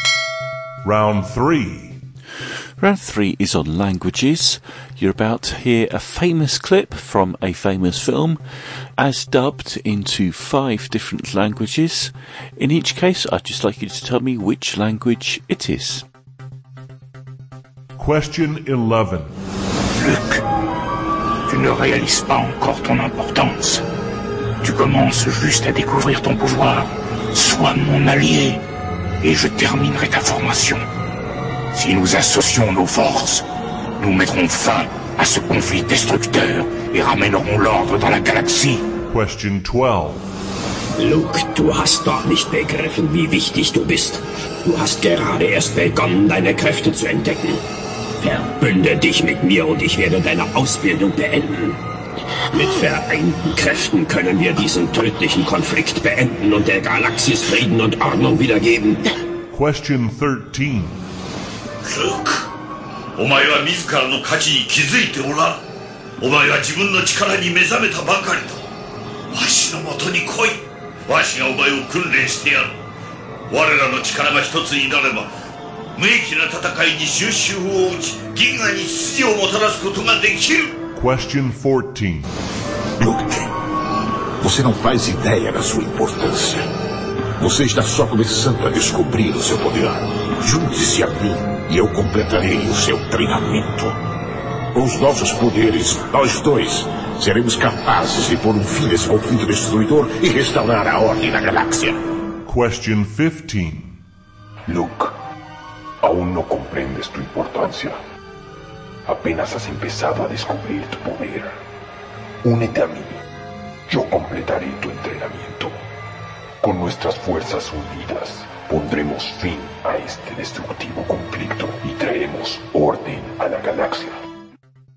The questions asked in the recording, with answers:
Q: In each case, I'd just like you to tell me which language it is.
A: the answer to number 11 was French.

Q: In each case, I'd just like you to tell me which language it is.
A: Number 12 was German.

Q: In each case, I'd just like you to tell me which language it is.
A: Number 13 was Japanese.

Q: In each case, I'd just like you to tell me which language it is.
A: Number 14 was Portuguese.

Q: In each case, I'd just like you to tell me which language it is.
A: And number 15 was Spanish.